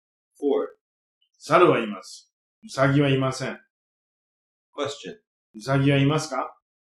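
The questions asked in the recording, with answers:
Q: ウサギはいますか?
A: いいえ、いません。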